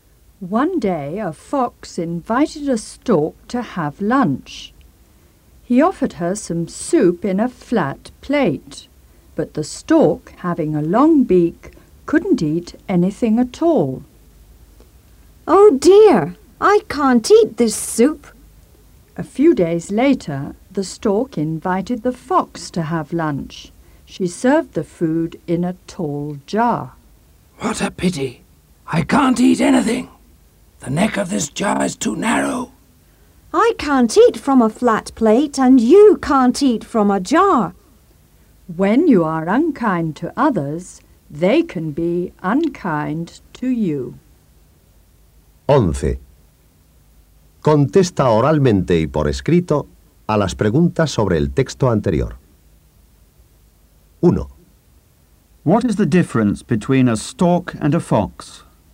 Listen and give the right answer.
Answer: The stork has got a long beak.